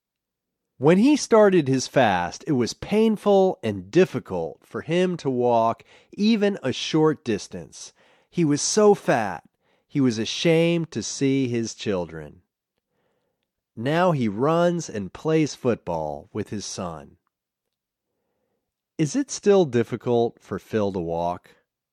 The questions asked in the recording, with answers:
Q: Is it still difficult for Phil to walk?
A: No, it's not difficult for Phil to walk.